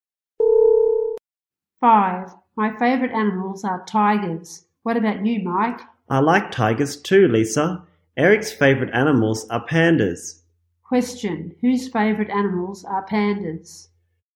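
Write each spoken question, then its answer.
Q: Question, whose favorite animals are pandas?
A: Eric's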